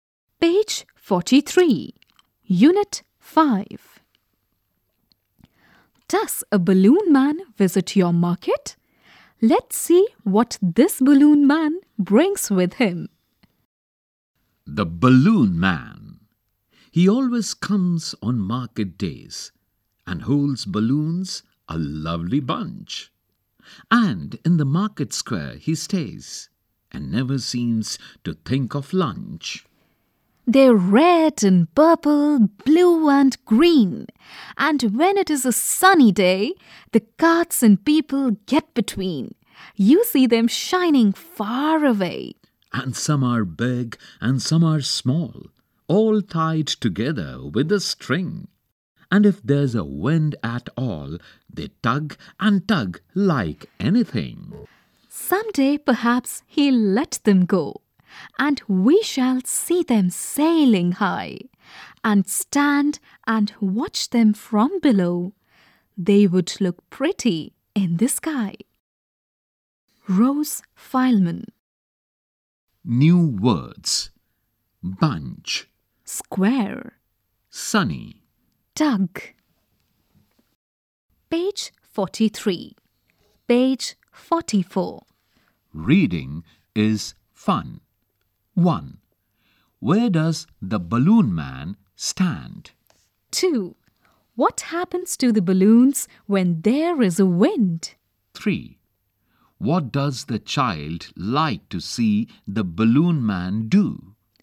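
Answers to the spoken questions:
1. In the market square
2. They tug and tug like anything
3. Let the balloons go so they sail high in the sky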